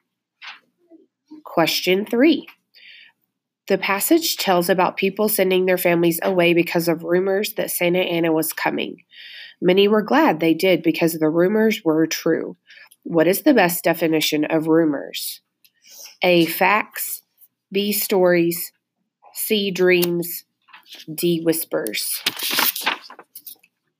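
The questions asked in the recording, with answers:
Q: What is the best definition of rumors?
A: B: Stories.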